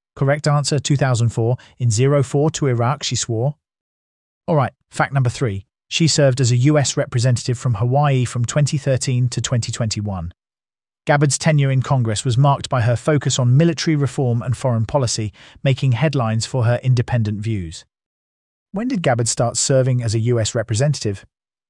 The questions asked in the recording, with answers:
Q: When did Gabbard start serving as a US representative?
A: Correct answer, 2013.